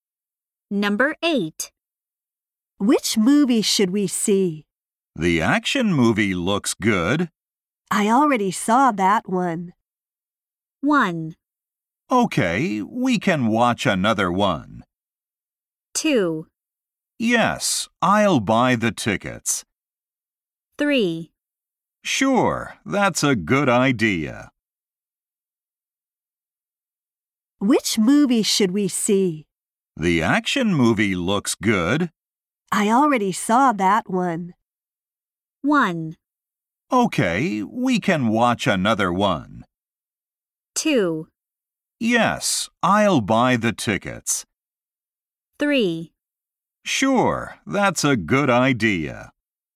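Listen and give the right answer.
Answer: 1: Okay, we can watch another one.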